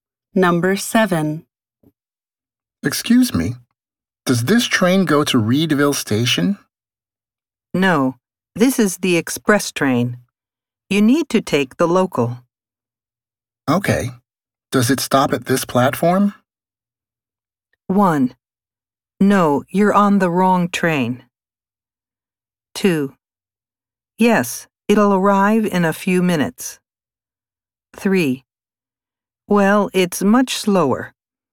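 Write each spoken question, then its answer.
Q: Okay, does it stop at this platform?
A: 2: Yes, it'll arrive in a few minutes.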